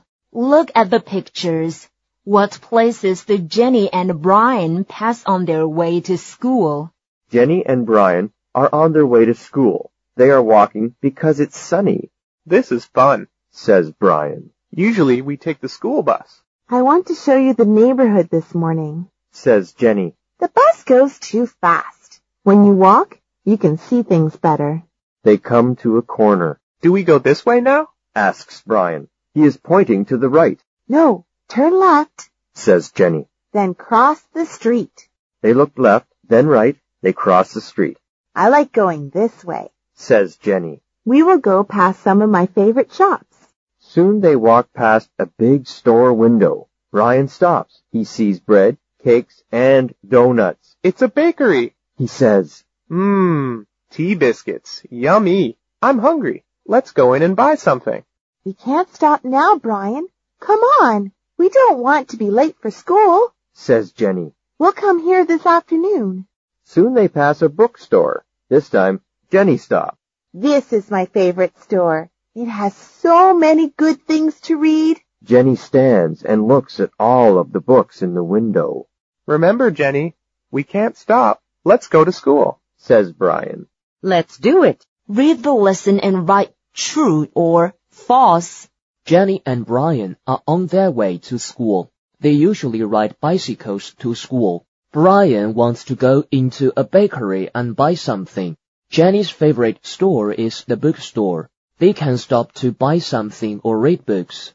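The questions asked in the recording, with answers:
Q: Jenny and Brian are on their way to school.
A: True

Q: They usually ride bicycles to school.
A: False

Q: Brian wants to go into a bakery and buy something.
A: True

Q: Jenny's favorite store is the bookstore.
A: True

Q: They can stop to buy something or read books.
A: False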